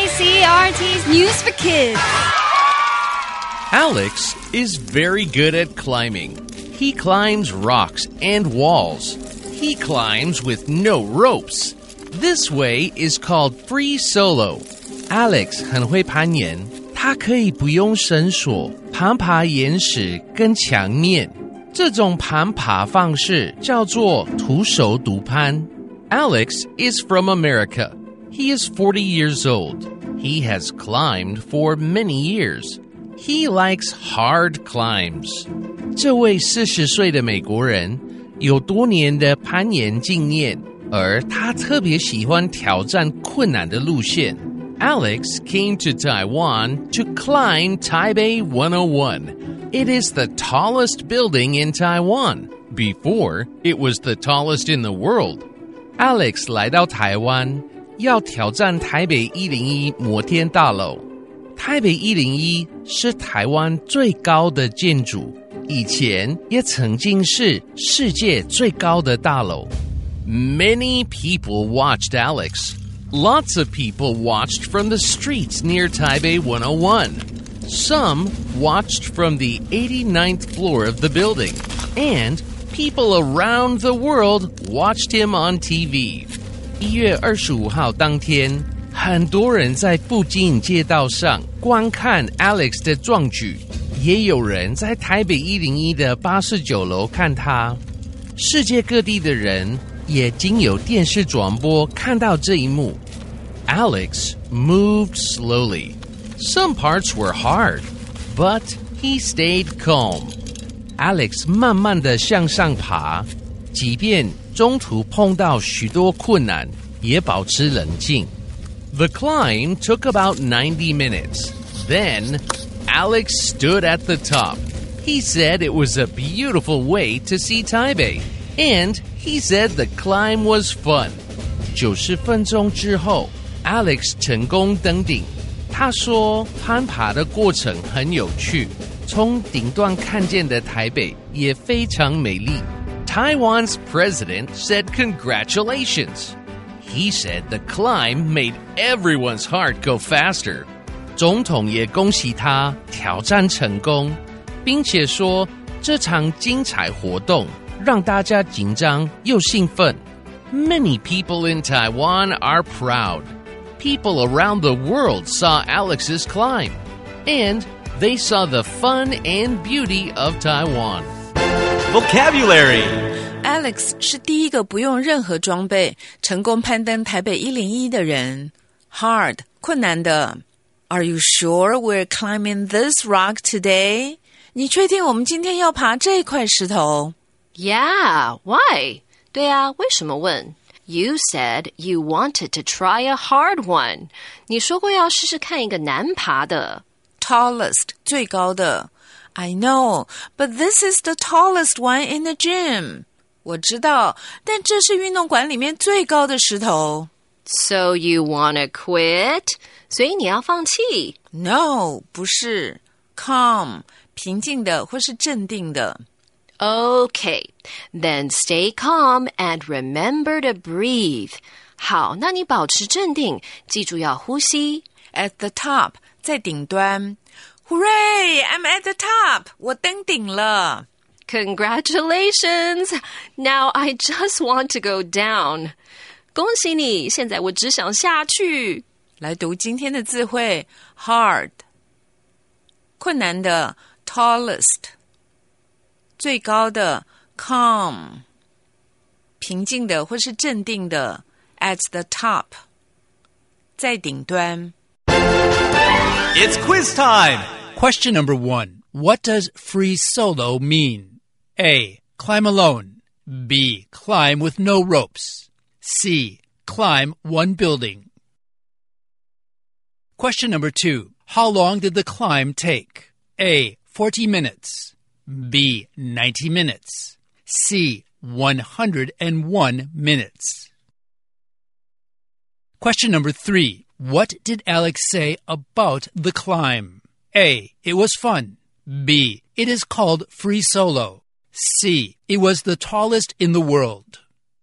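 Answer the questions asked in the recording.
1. B: Climb with no ropes.
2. B: 90 minutes.
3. A: It was fun.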